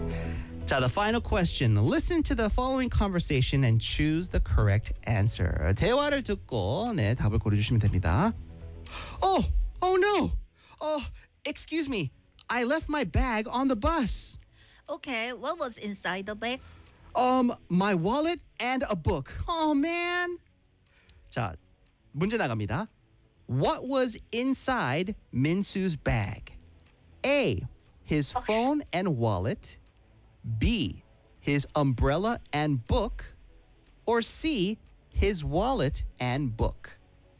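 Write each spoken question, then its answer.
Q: What was inside Minsu's bag?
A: C: His wallet and book.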